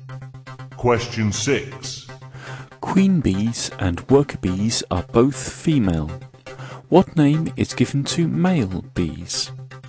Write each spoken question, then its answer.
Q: What name is given to male bees?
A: male bees are called drones